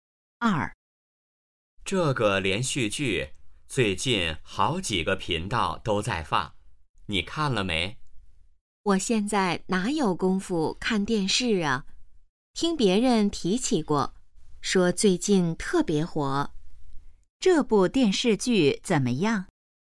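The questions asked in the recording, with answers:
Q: 这部电视剧怎么样?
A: 最近特别火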